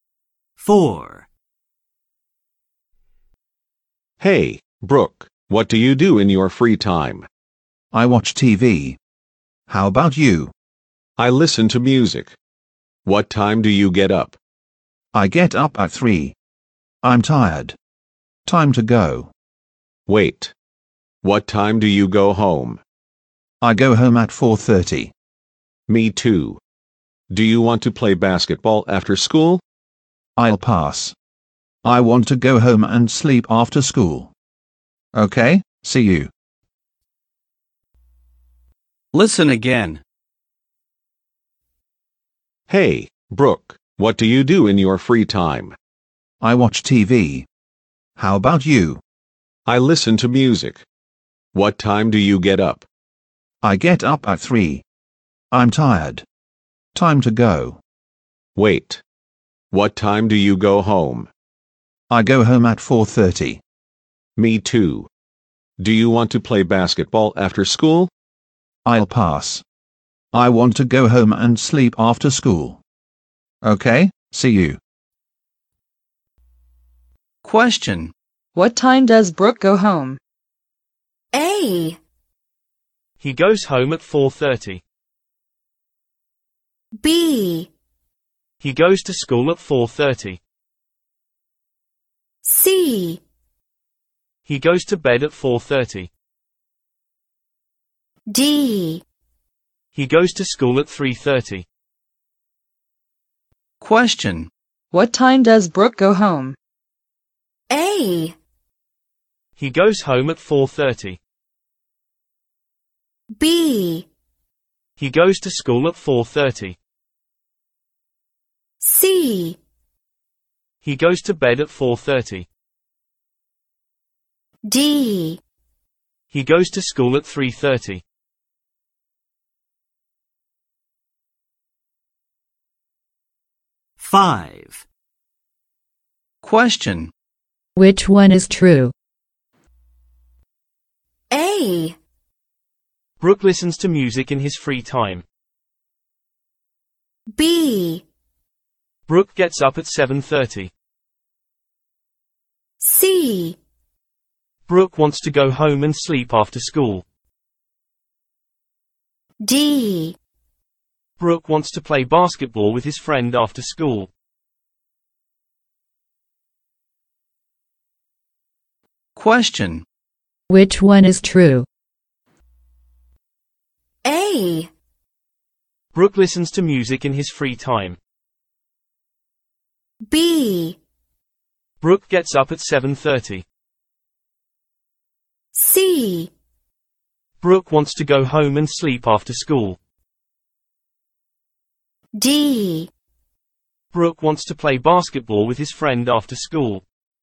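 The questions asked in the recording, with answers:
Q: What time does Brooke go home?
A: A: He goes home at 4:30.

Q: Which one is true?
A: C: Brooke wants to go home and sleep after school.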